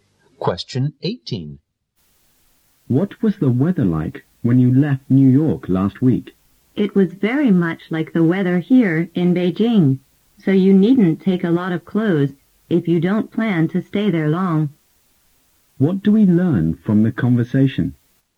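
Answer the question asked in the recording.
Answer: New York's weather is similar to Beijing's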